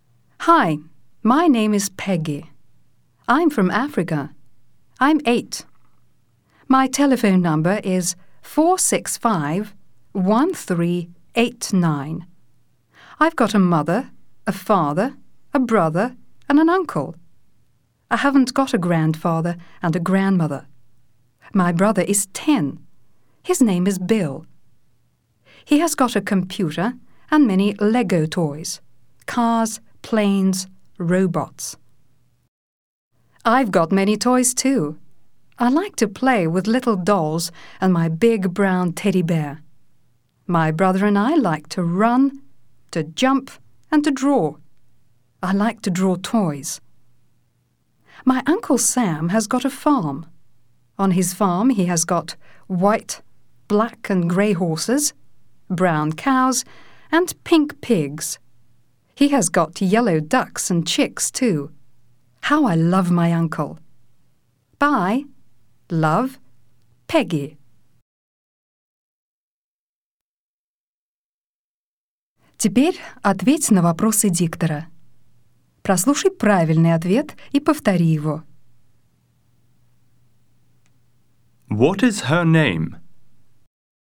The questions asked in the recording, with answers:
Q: What is her name?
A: Her name is Peggy.